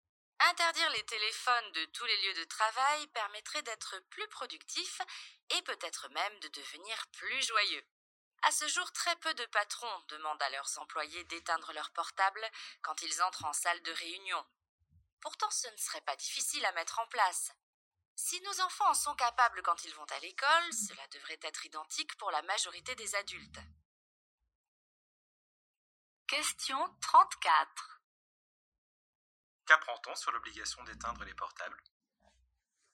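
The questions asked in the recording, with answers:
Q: Qu'apprend-on sur l'obligation d'éteindre les portables ?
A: Très peu de patrons l'imposent à leurs employés en réunion.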